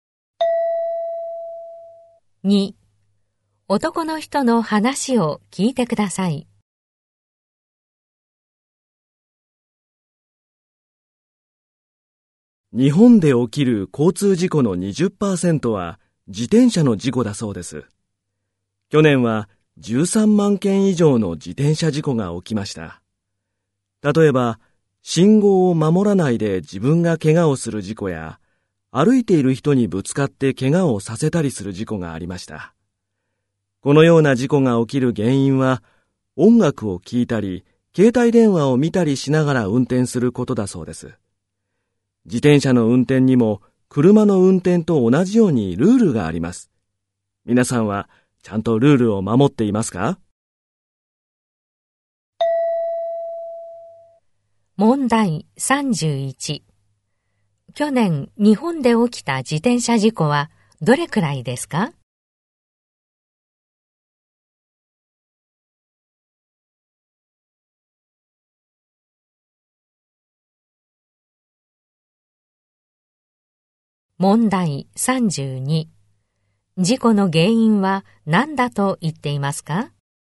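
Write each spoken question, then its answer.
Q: 去年、日本で起きた自転車事故はどれくらいですか?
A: 13万件以上

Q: 事故の原因は何だと言っていますか?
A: 音楽を聴いたり携帯電話を見たりしながら運転すること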